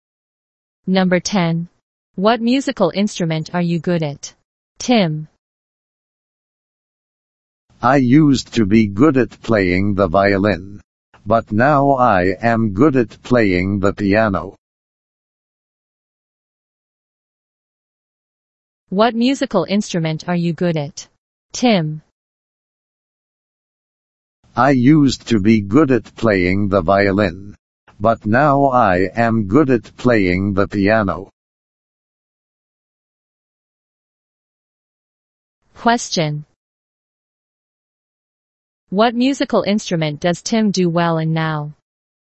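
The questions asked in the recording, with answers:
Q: What musical instrument does Tim do well in now?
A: The piano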